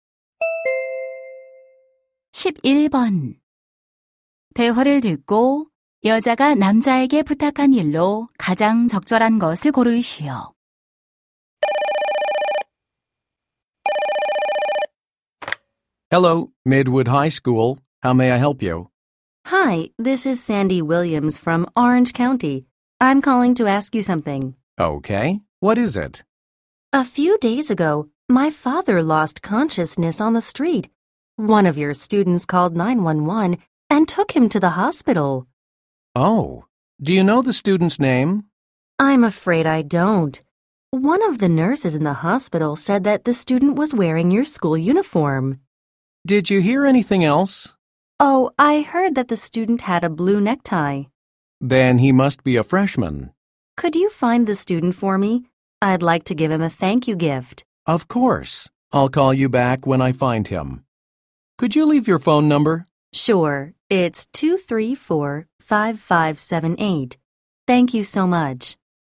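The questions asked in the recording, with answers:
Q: 대화를 듣고 여자가 남자에게 부탁한 일로 가장 적절한 것을 고르시오.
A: 아버지를 도와준 학생 찾아 주기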